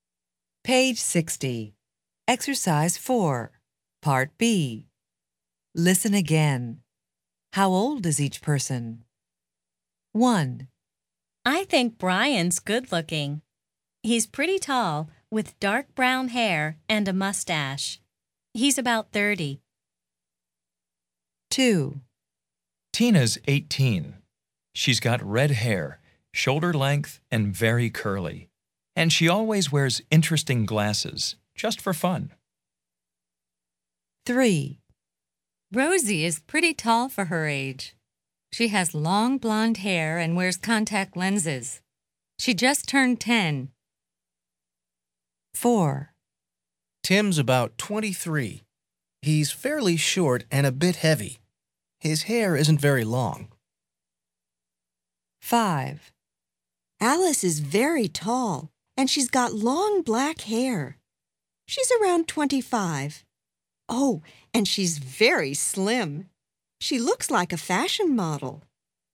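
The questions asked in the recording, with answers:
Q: How old is each person?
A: Brian is about 30

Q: How old is each person?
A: Tina is 18

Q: How old is each person?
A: Rosie is 10

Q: How old is each person?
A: Tim is about 23

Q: How old is each person?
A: Alice is around 25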